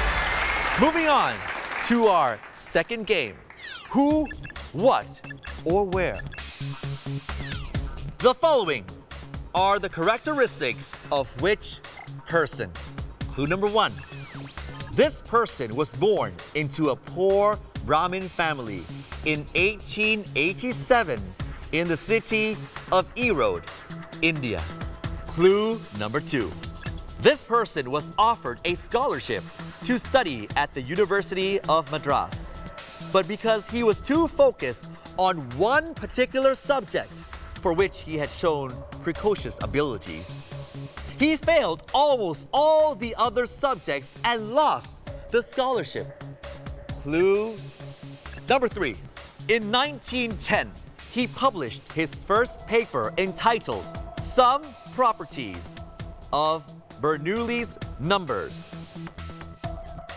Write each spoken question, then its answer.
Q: Who, what, or where? The following are the characteristics of which person?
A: ทร์รามานุจันทร์คือคําตอบ